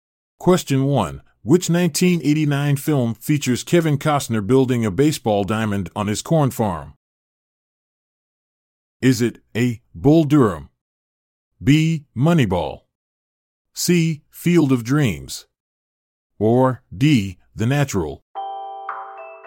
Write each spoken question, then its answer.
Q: Which 1989 film features Kevin Costner building a baseball diamond on his corn farm?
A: The answer is C. Field of Dreams.